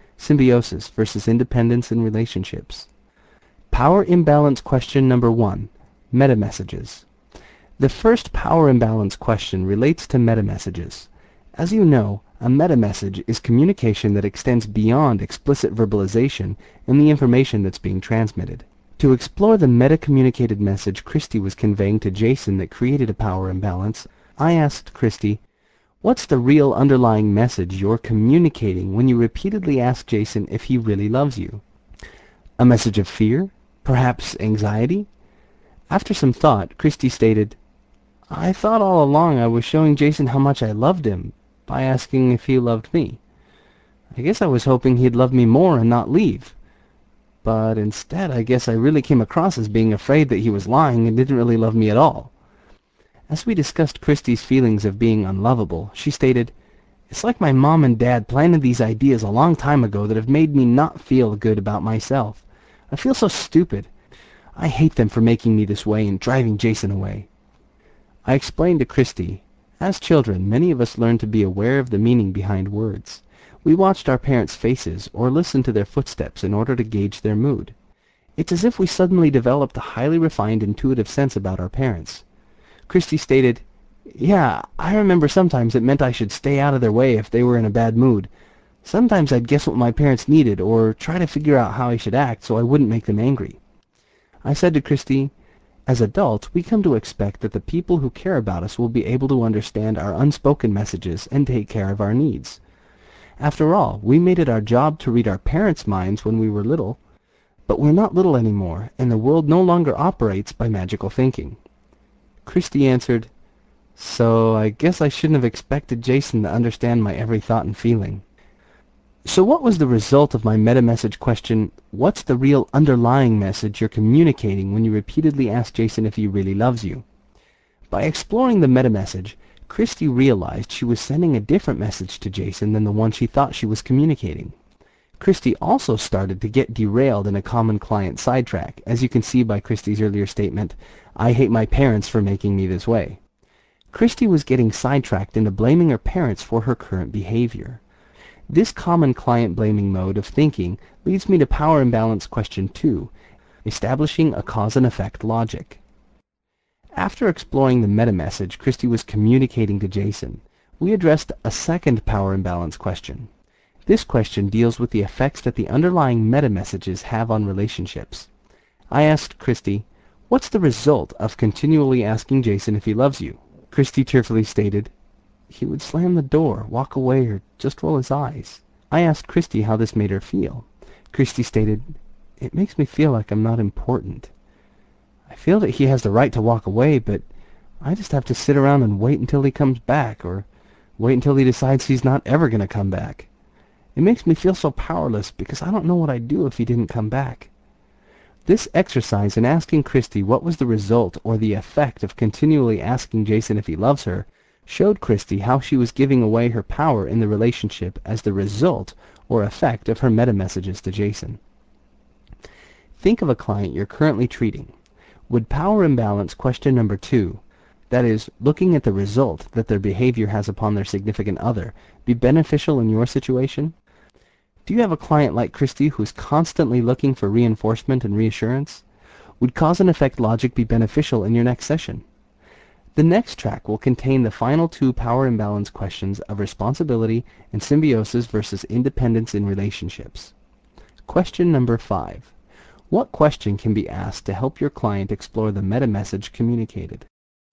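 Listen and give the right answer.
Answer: What's the real underlying message you're communicating when you repeatedly ask (your partner) if he really loves you?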